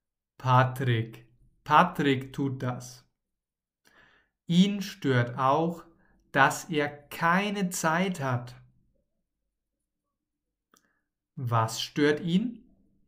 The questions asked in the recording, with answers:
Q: Was stört ihn?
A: Dass er keine Zeit hat. Ihn stört, dass er keine Zeit hat.